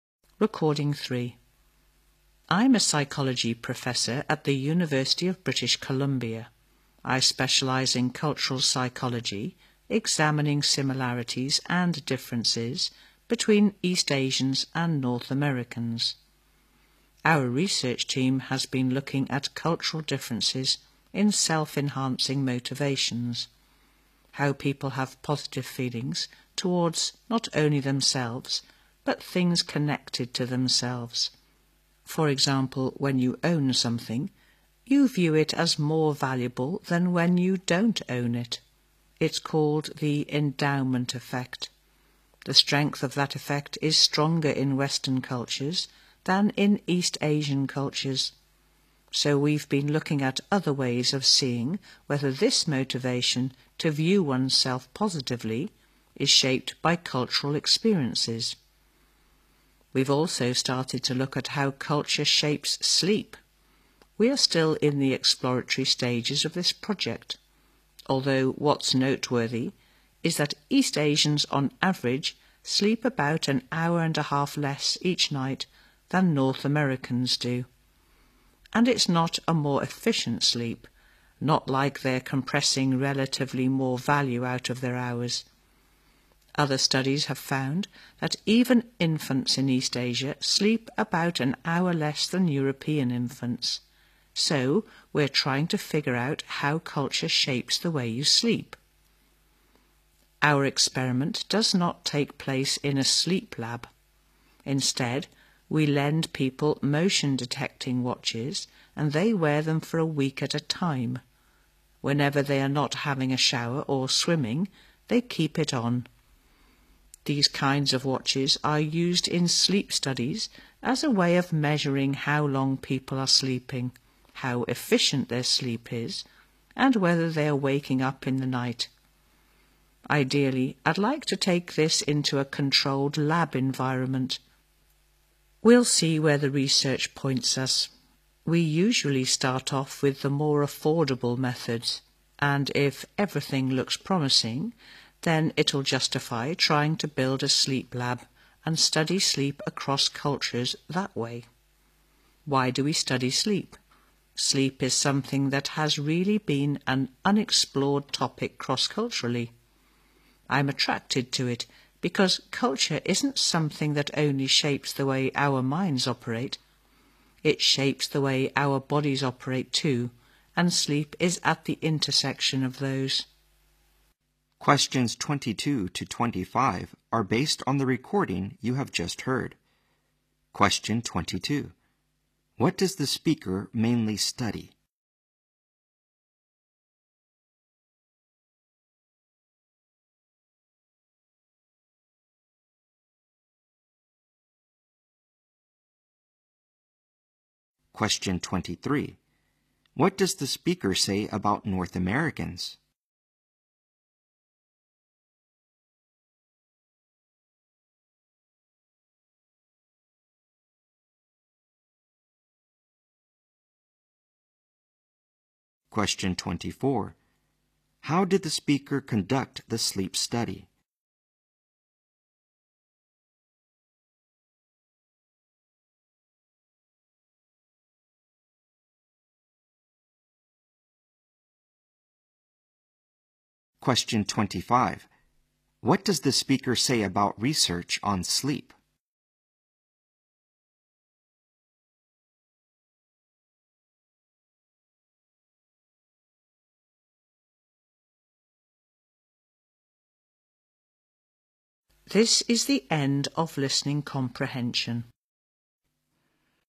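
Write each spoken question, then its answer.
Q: What does the speaker mainly study?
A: Cultural psychology

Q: What does the speaker say about North Americans?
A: They sleep about an hour and a half more each night than East Asians

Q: How did the speaker conduct the sleep study?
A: By lending people motion-detecting watches to wear for a week

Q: What does the speaker say about research on sleep?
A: It has been largely unexplored across cultures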